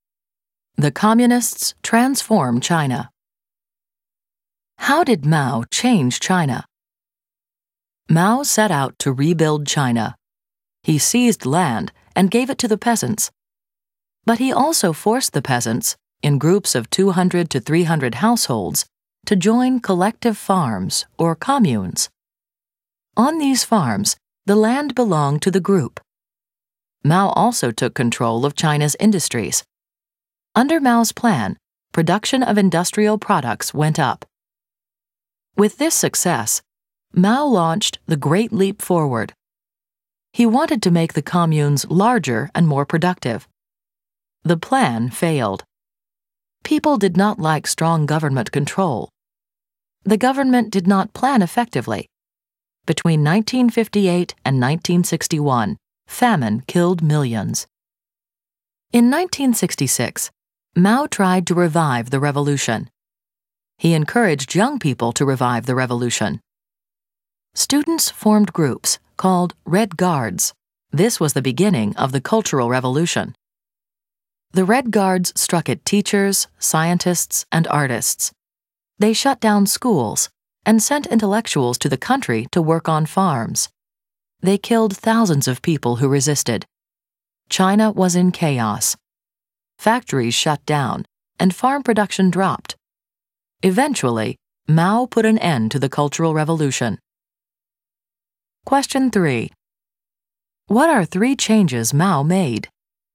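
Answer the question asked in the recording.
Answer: Gave land to peasants and forced them into collective farms; took control of industries; launched the Great Leap Forward (also the Cultural Revolution)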